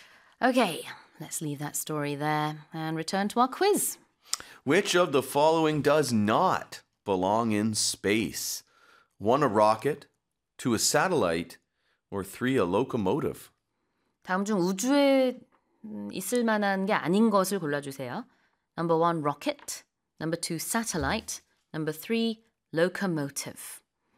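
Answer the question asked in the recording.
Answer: 3: a locomotive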